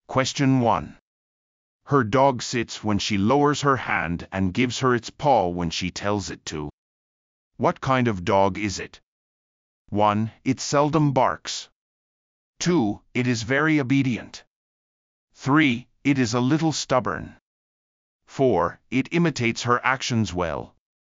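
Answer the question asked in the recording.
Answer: 2: It is very obedient.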